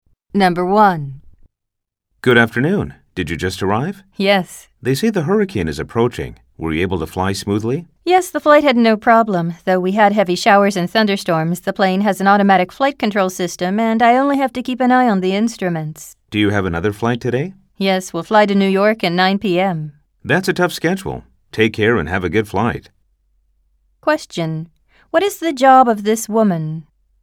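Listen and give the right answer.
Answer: She is a pilot.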